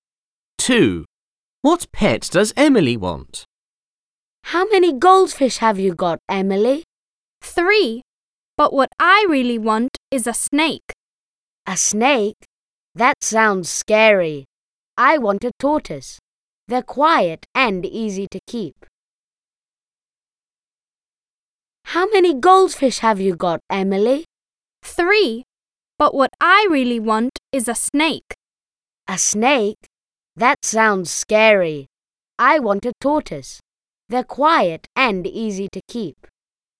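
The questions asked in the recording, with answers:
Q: What pet does Emily want?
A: A snake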